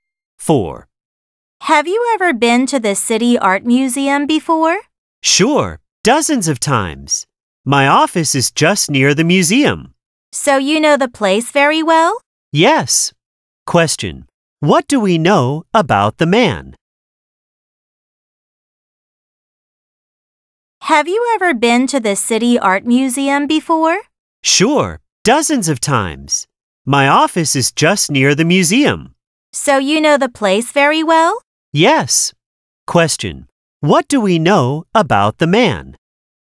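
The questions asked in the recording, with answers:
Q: What do we know about the man?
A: He knows the museum well; his office is near it and he's been there dozens of times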